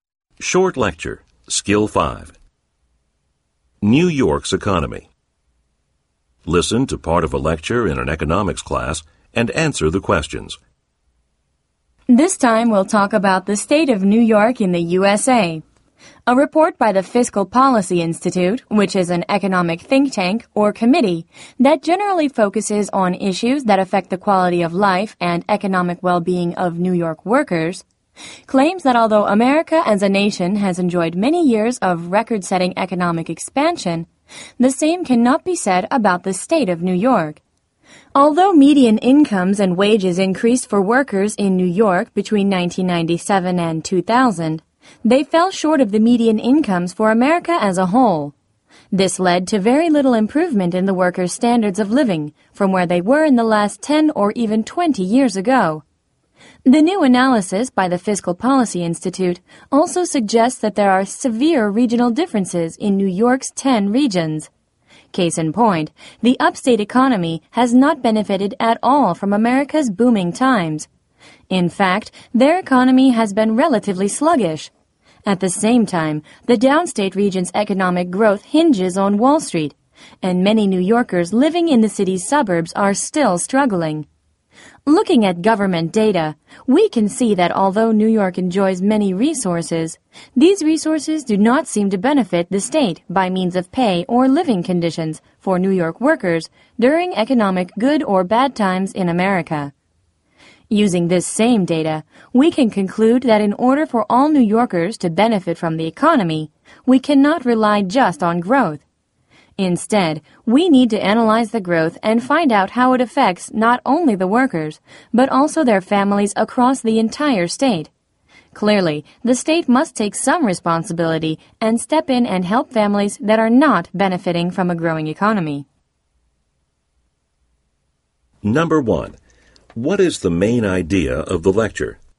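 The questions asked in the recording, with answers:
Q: What is the main idea of the lecture?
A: New York's economy and its workers have not benefited from America's economic expansion the way the rest of the nation has.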